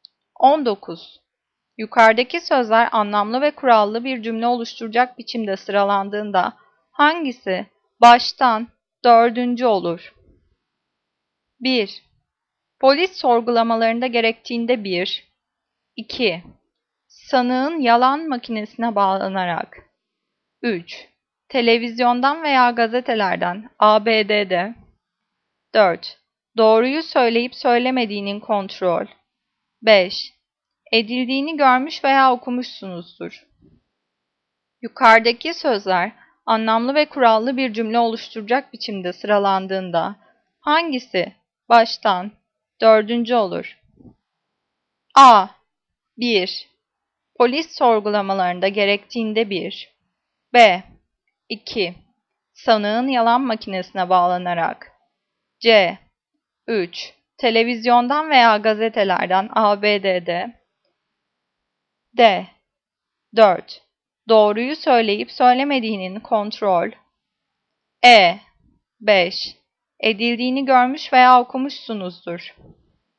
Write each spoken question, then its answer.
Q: Yukarıdaki sözler anlamlı ve kurallı bir cümle oluşturacak biçimde sıralandığında hangisi baştan dördüncü olur?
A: Cevap D. 4. Doğruyu söyleyip söylemediğinin kontrol.